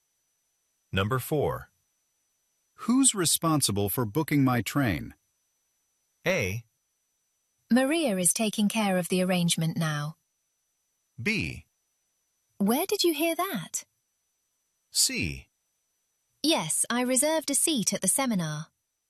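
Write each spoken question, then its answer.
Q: Who's responsible for booking my train?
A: A: Maria is taking care of the arrangement now.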